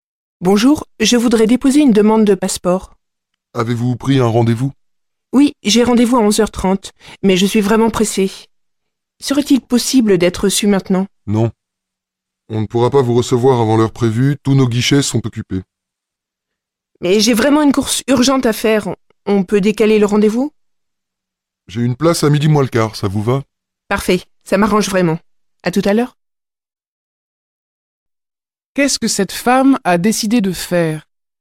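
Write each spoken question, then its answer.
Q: Qu'est-ce que cette femme a décidé de faire ?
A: Décaler son rendez-vous à midi moins le quart.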